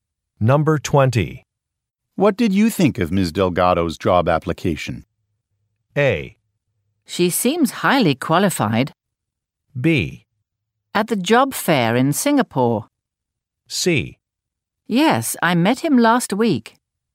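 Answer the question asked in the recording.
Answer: A: She seems highly qualified.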